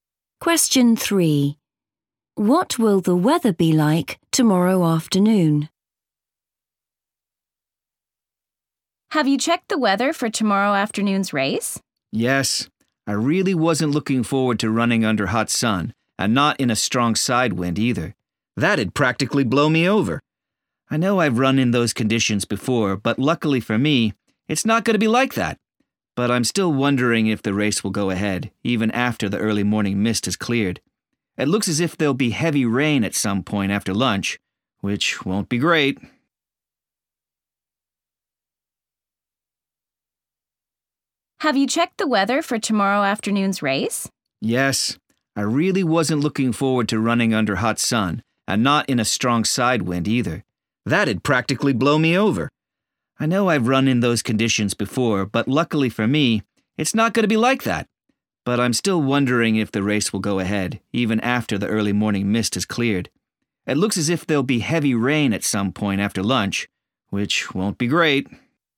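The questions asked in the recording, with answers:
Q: What will the weather be like tomorrow afternoon?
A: heavy rain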